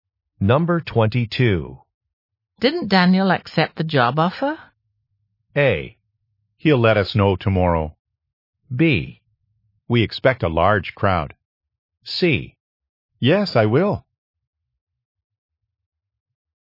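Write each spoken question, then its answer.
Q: Didn't Daniel accept the job offer?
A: A: He'll let us know tomorrow.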